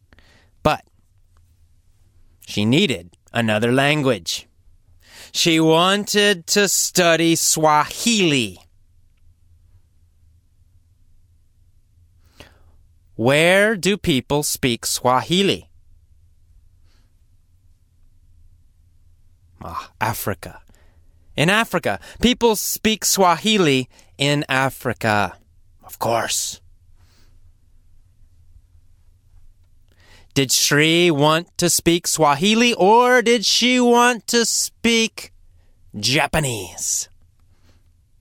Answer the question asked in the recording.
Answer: She wanted to speak Swahili.